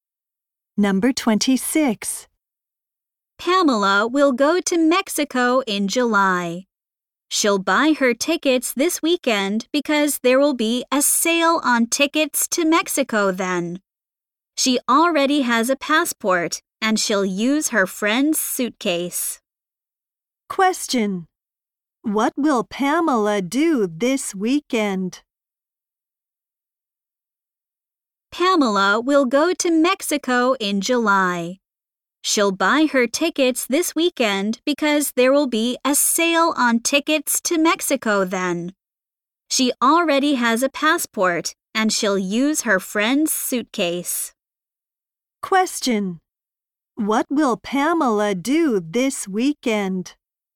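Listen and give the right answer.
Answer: Buy her tickets to Mexico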